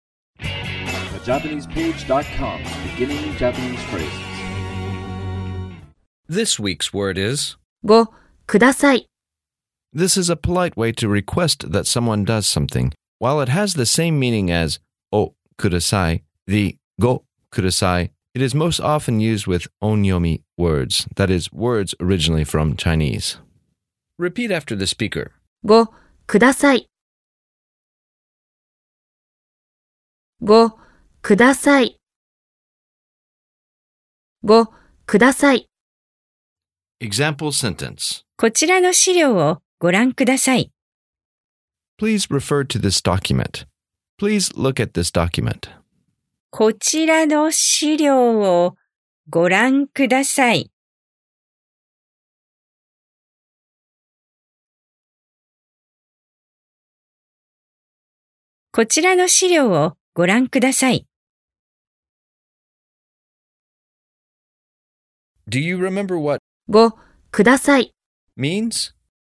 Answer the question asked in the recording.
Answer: Please do something.